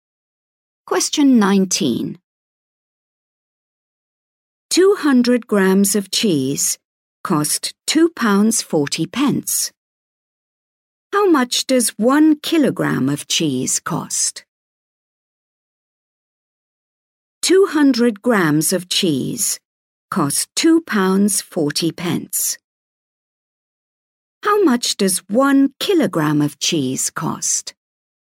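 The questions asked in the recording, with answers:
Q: How much does 1 kilogram of cheese cost?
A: £12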